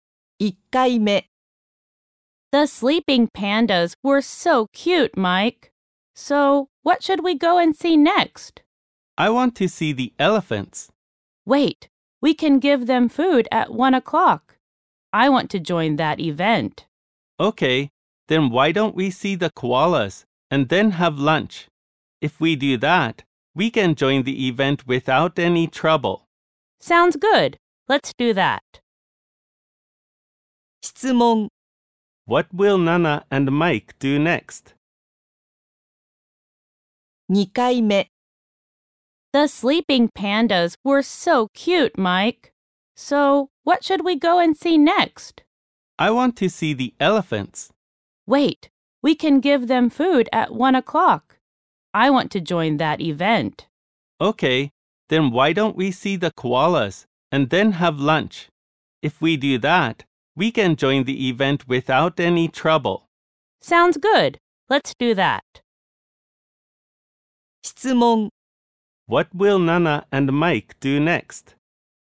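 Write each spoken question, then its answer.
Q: What will Nana and Mike do next?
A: See the koalas and then have lunch.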